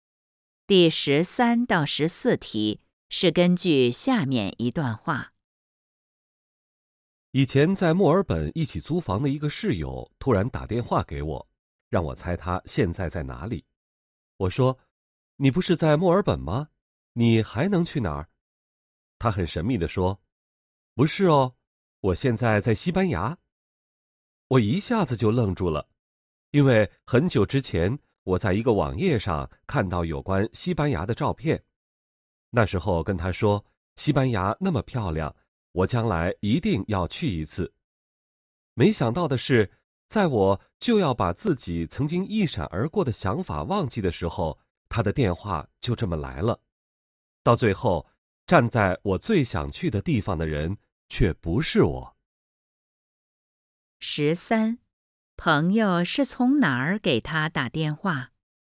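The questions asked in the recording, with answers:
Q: 朋友是从哪儿给他打电话?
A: 西班牙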